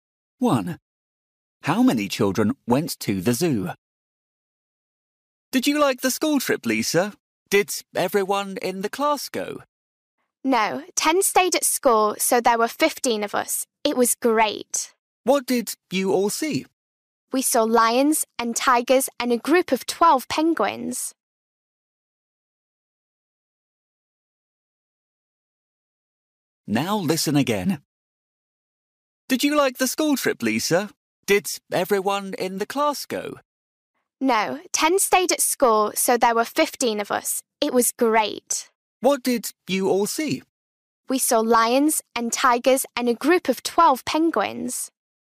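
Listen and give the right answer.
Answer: 15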